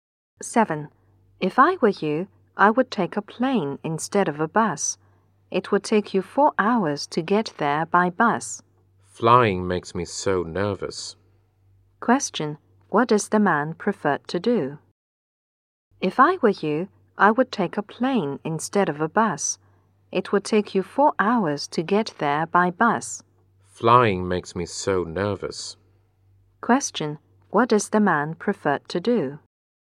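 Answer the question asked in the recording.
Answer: Take a bus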